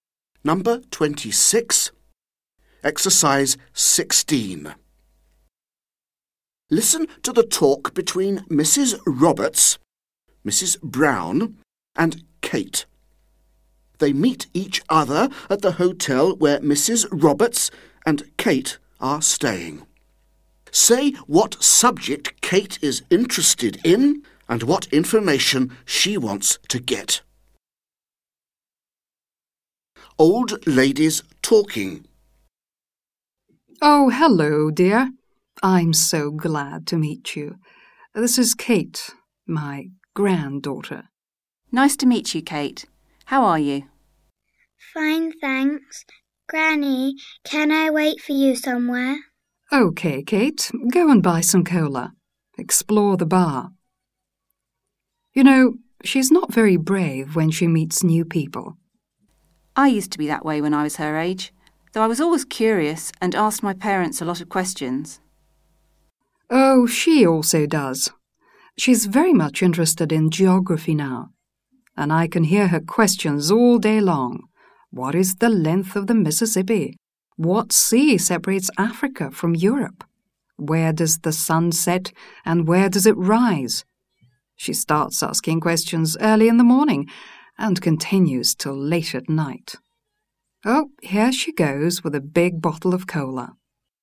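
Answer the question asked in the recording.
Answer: Geography; she wants to know the length of the Mississippi, what sea separates Africa from Europe, and where the sun sets and rises.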